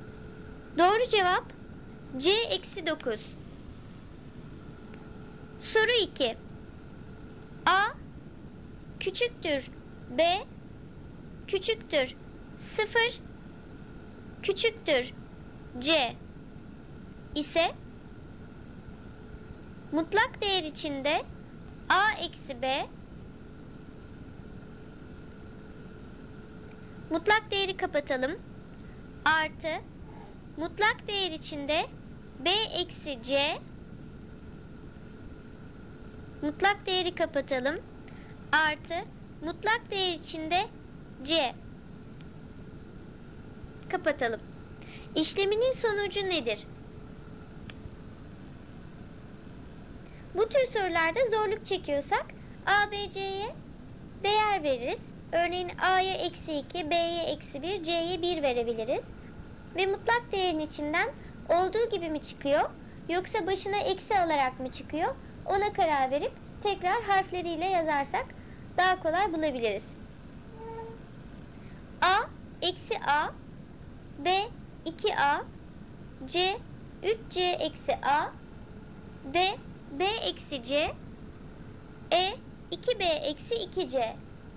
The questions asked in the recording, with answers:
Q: İşleminin sonucu nedir?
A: Doğru cevap C 2C eksi A.